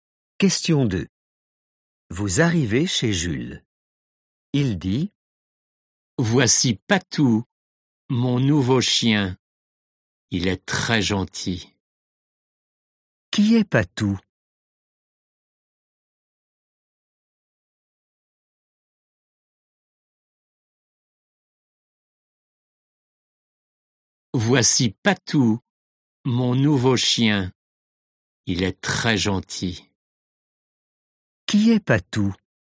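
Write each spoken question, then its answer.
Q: Qui est Patou?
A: son nouveau chien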